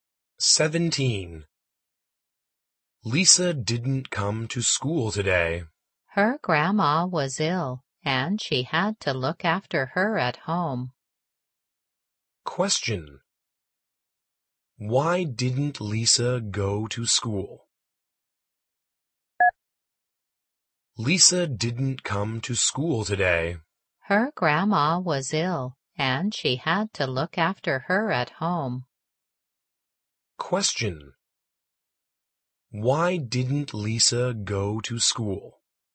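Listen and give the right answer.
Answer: She had to look after her ill grandma.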